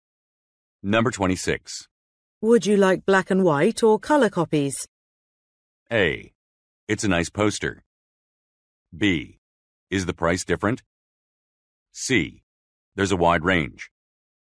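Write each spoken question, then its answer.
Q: Would you like black and white or color copies?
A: B: Is the price different?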